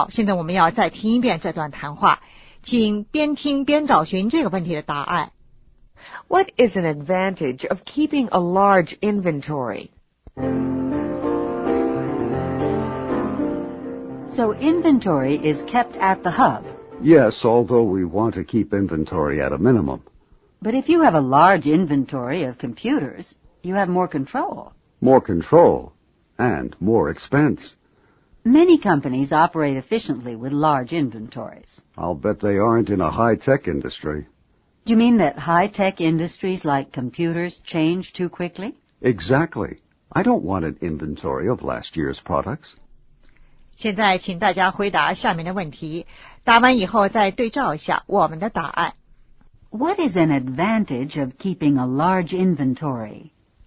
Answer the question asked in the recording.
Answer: More control.